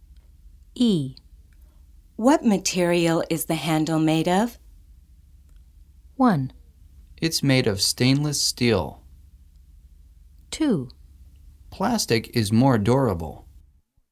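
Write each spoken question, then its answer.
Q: What material is the handle made of?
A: 1: It's made of stainless steel.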